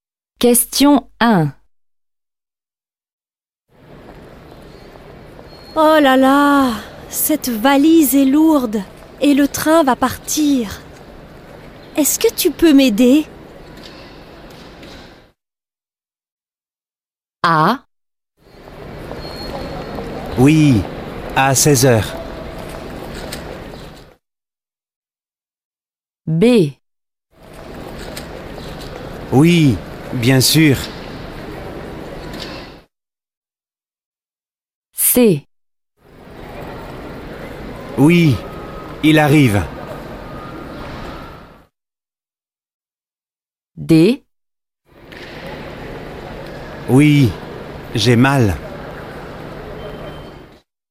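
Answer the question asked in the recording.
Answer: B: Oui, bien sûr.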